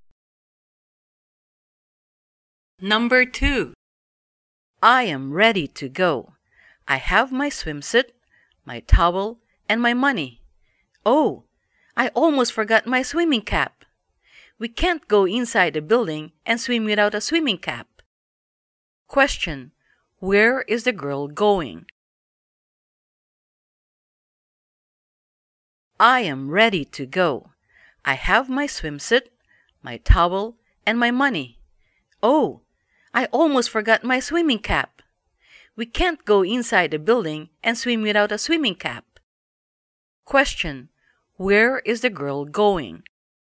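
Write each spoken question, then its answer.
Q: Question, where is the girl going?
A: To the swimming pool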